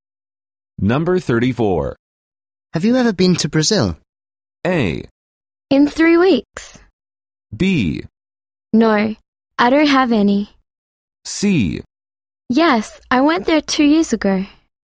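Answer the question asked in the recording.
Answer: C: Yes, I went there 2 years ago.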